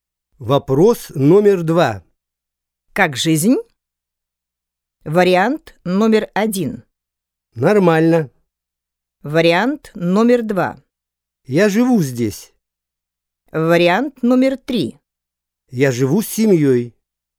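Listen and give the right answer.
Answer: 1: Нормально.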